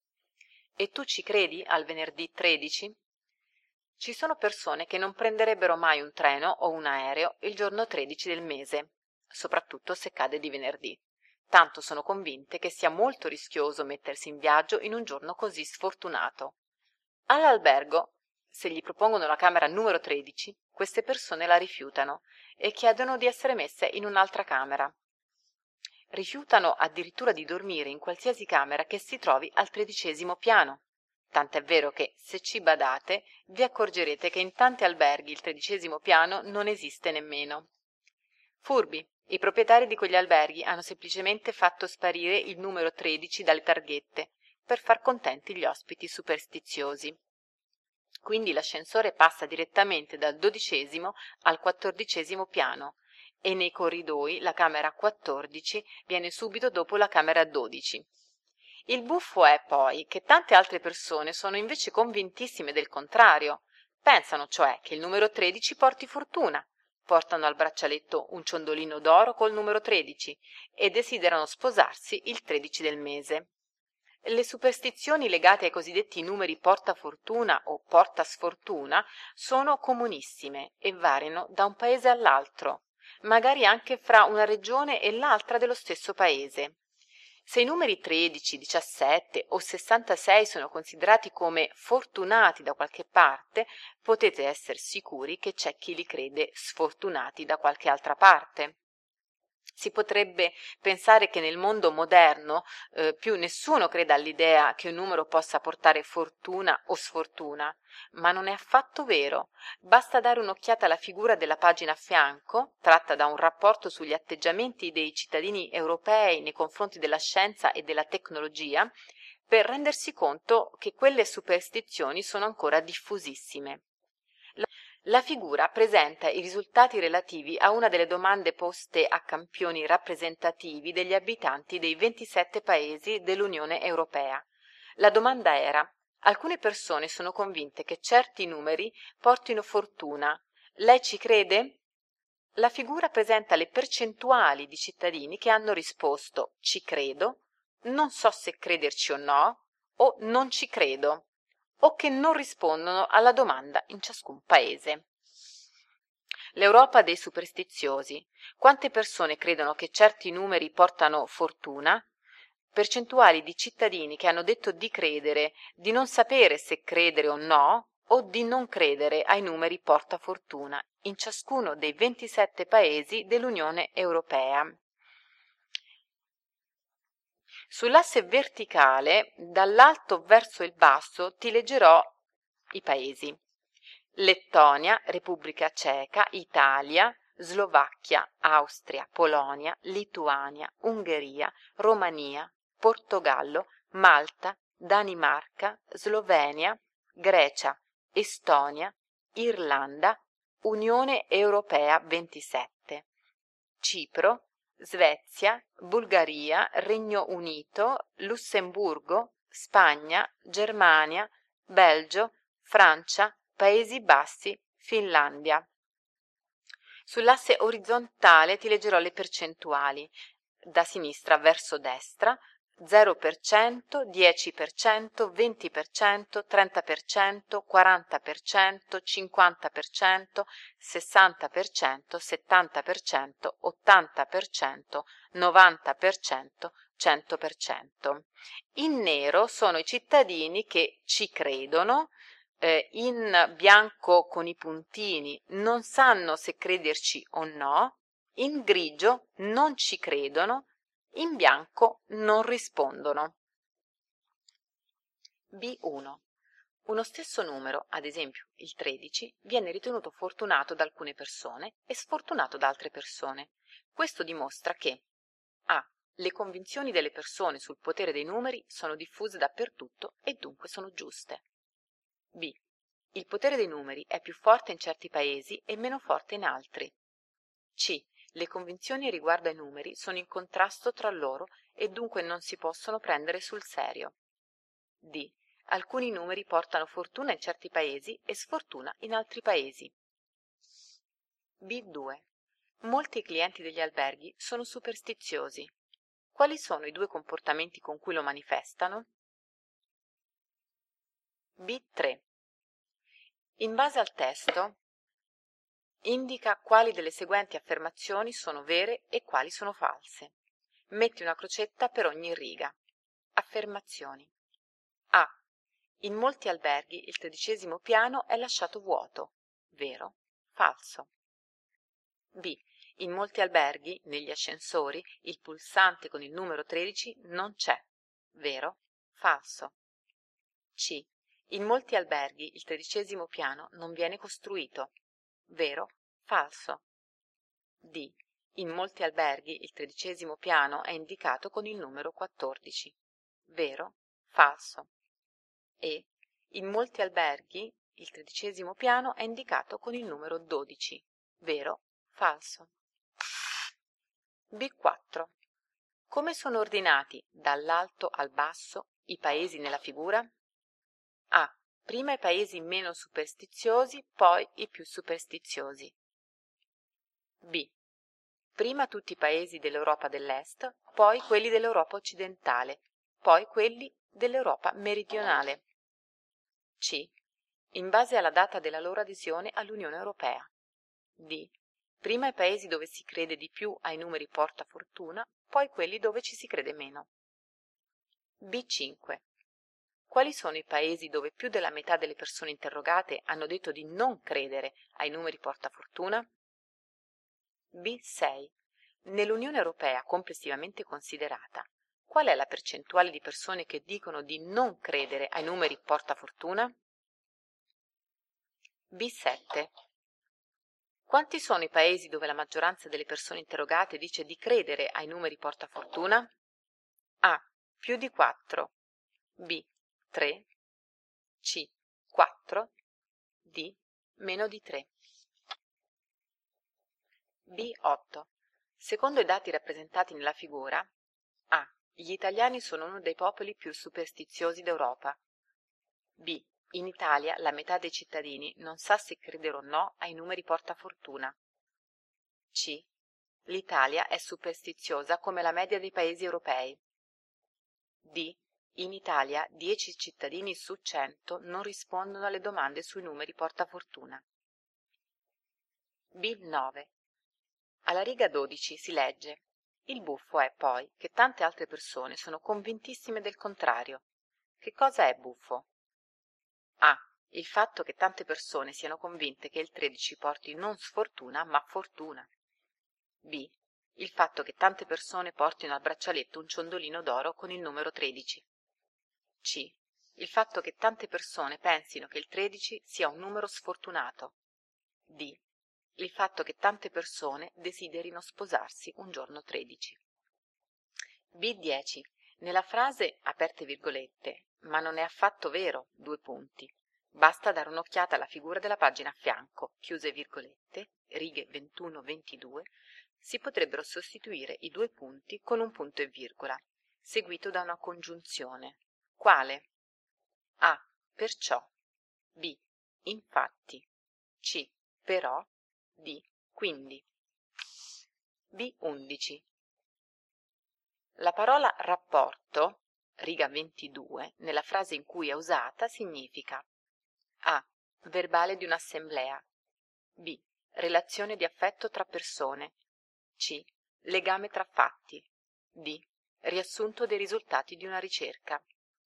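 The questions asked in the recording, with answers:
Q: Quali sono i due comportamenti con cui lo manifestano?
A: Rifiutano la camera numero 13 e rifiutano di dormire in camere al 13° piano

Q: Che cosa è buffo?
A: A: Il fatto che tante persone siano convinte che il 13 porti non sfortuna, ma fortuna.

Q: Quale?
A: B: Infatti.

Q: La parola rapporto, riga 22, nella frase in cui è usata, significa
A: D: Riassunto dei risultati di una ricerca.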